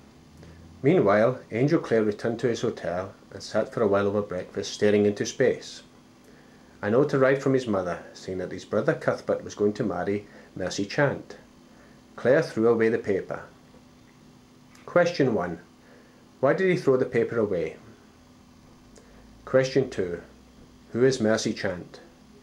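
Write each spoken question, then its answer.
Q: Who is Mercy Chant?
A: The woman his brother Cuthbert is going to marry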